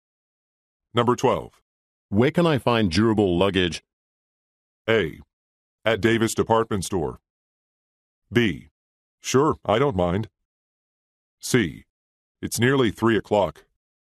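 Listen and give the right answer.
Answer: A: At Davis Department Store.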